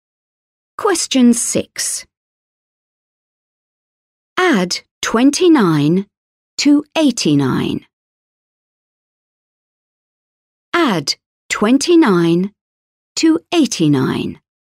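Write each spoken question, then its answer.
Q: Add 29 to 89.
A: 118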